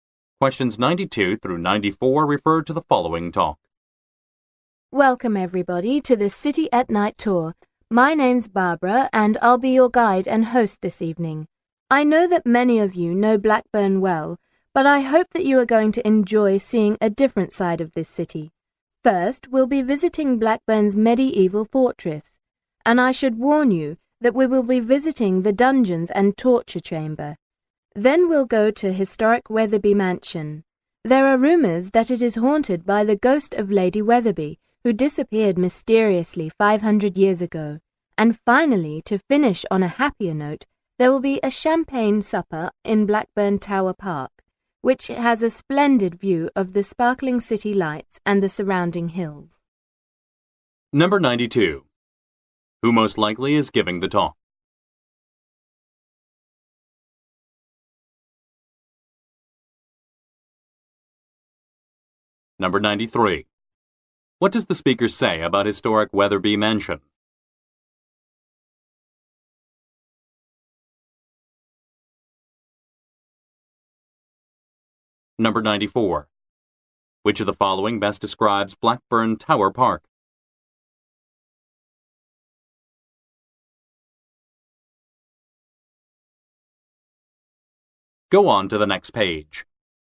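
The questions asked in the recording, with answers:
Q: Who most likely is giving the talk?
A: A tour guide

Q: What does the speaker say about historic Weatherby Mansion?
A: It is rumored to be haunted

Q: Which of the following best describes Blackburn Tower Park?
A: It has a splendid view of the city lights and hills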